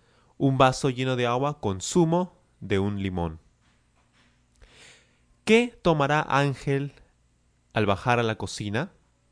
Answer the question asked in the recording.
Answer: Él tomará un vaso lleno de agua con zumo de un limón, con líquido que se extrae del limón.